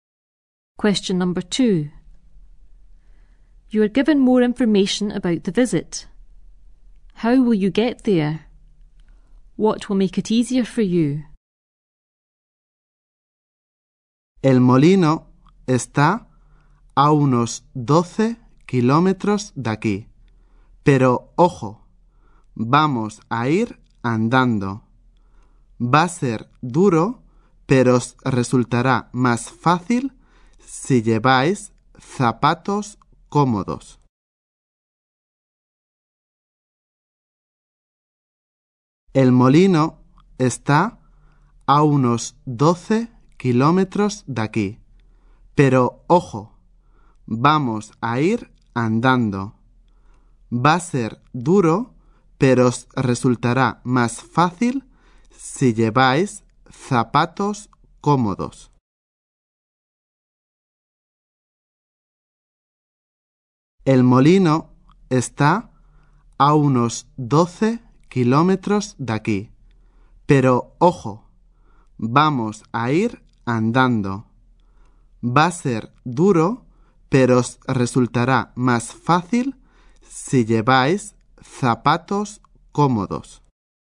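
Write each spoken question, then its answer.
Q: How will you get there?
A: On foot (walking, about 12 km)

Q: What will make it easier for you?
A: Wearing comfortable shoes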